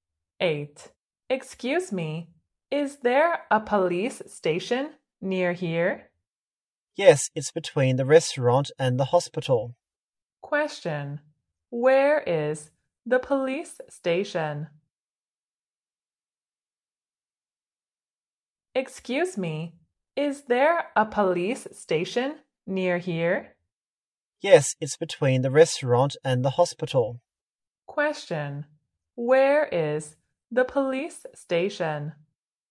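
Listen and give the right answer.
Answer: Between the restaurant and the hospital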